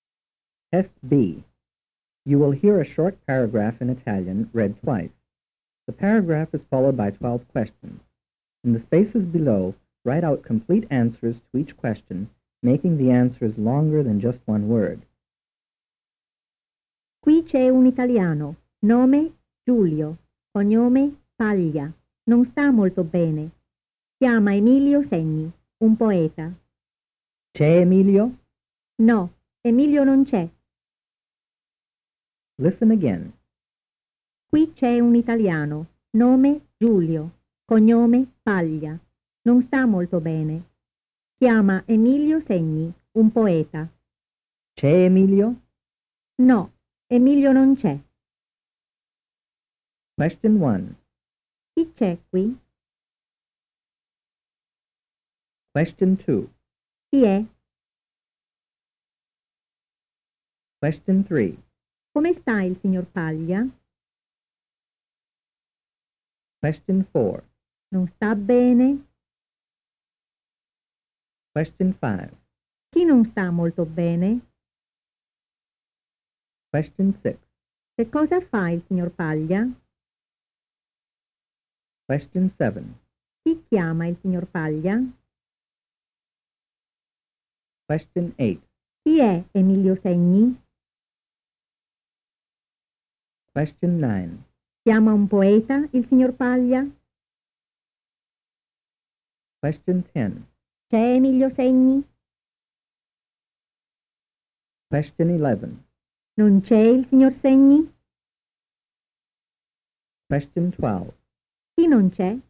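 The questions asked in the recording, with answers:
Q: Chi c'è qui?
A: Qui c'è un italiano, Giulio Paglia.

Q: Chi è?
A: È Giulio Paglia.

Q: Come sta il signor Paglia?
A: Non sta molto bene.

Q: Non sta bene?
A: No, non sta molto bene.

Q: Chi non sta molto bene?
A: Il signor Giulio Paglia.

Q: Che cosa fa il signor Paglia?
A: Chiama Emilio Segni.

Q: Chi chiama il signor Paglia?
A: Chiama Emilio Segni, un poeta.

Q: Chi è Emilio Segni?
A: È un poeta.

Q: Chiama un poeta il signor Paglia?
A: Sì, chiama un poeta, Emilio Segni.

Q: C'è Emilio Segni?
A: No, Emilio Segni non c'è.

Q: Non c'è il signor Segni?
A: No, il signor Segni non c'è.

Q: Chi non c'è?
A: Emilio Segni non c'è.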